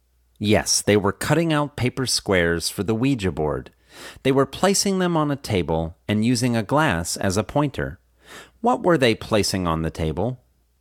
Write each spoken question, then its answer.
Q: What were they placing on the table?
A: They were placing the paper squares on the table.